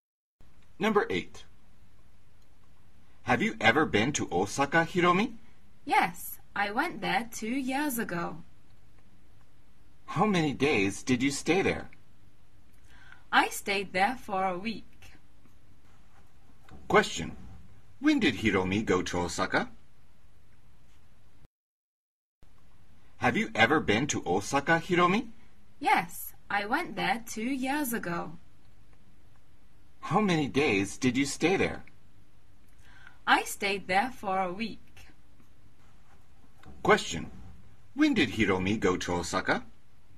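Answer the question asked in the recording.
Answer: 2 years ago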